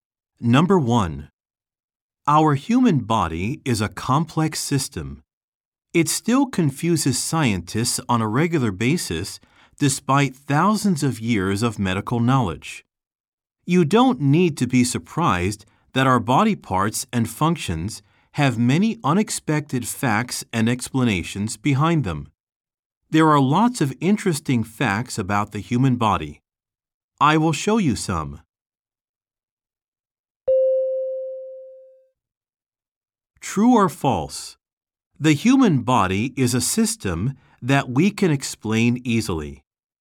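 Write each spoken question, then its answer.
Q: True or false? The human body is a system that we can explain easily.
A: False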